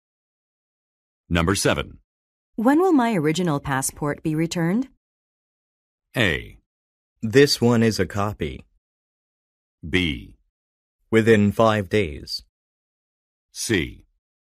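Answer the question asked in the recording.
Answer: B: Within 5 days.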